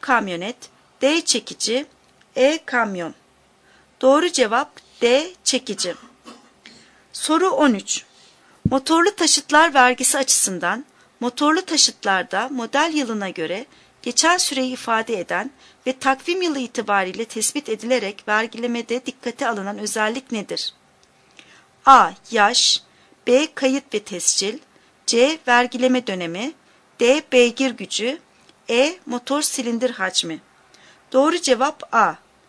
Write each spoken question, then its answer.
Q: Motorlu taşıtlar vergisi açısından motorlu taşıtlarda model yılına göre geçen süreyi ifade eden ve takvim yılı itibariyle tespit edilerek vergilemede dikkate alınan özellik nedir?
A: Doğru cevap A. Yaş.